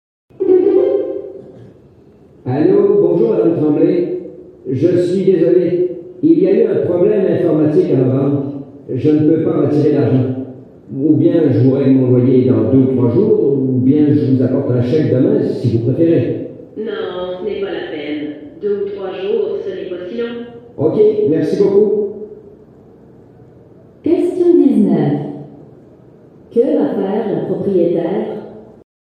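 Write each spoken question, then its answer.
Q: Que va faire la propriétaire ?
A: Attendre 2 ou 3 jours pour recevoir le loyer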